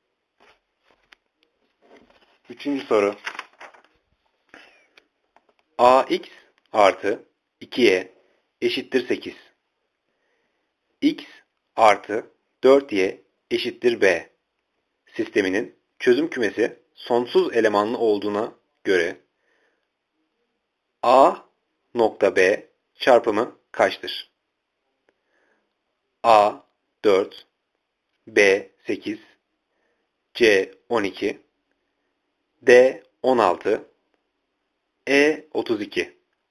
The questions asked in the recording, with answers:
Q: Sisteminin çözüm kümesi sonsuz elemanlı olduğuna göre A nokta B çarpımı kaçtır?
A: Cevap B 8.